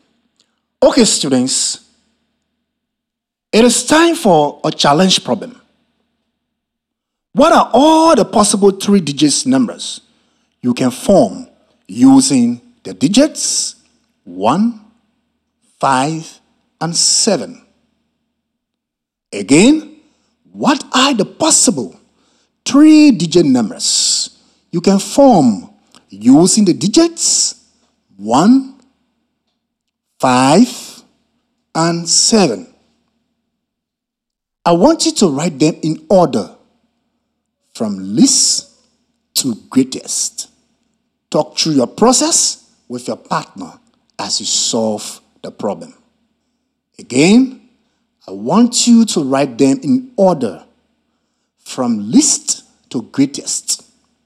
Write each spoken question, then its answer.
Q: What are all the possible 3-digit numbers you can form using the digits 1, 5, and 7?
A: So, the 6 numbers from least to greatest are 157,